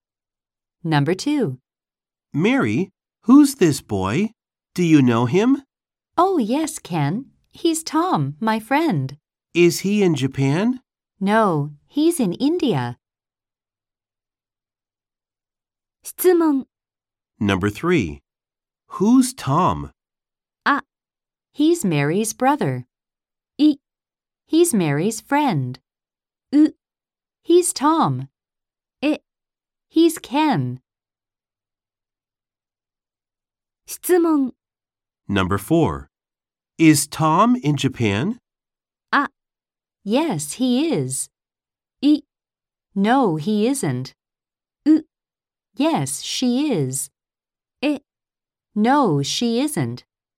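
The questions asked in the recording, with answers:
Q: Who's Tom?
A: B: He's Mary's friend.

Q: Is Tom in Japan?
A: B: No, he isn't.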